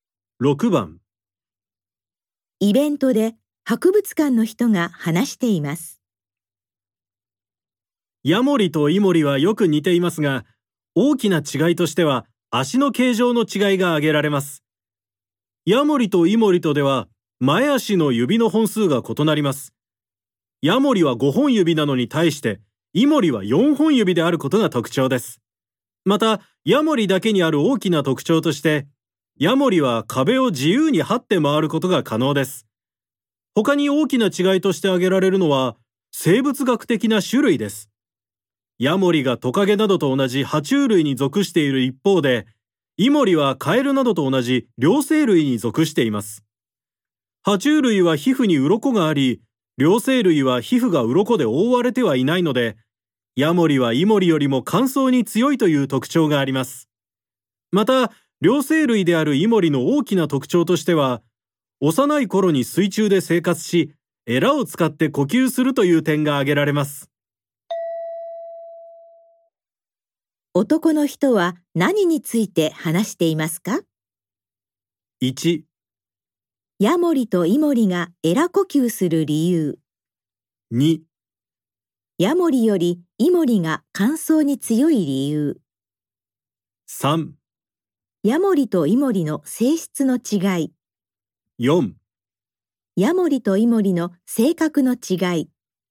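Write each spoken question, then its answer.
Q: 男の人は何について話していますか ?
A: 3: ヤモリとイモリの性質の違い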